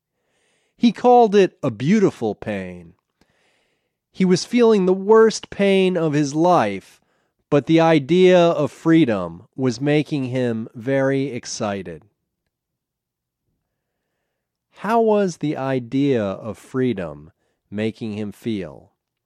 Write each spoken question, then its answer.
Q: How was the idea of freedom making him feel?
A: The idea of freedom was making him feel very excited.